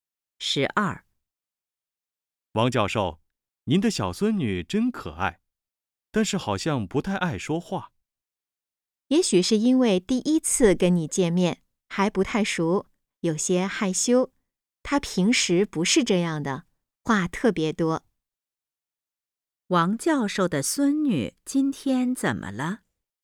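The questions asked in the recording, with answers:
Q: 王教授的孙女今天怎么了?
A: 有些害羞,不太爱说话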